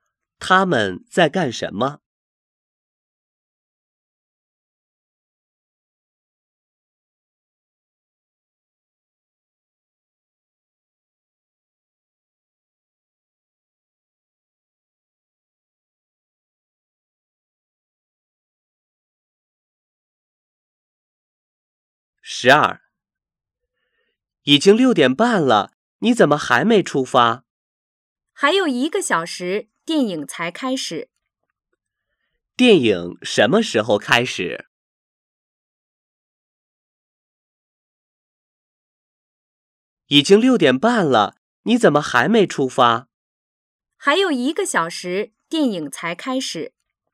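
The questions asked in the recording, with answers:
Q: 电影什么时候开始?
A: 七点半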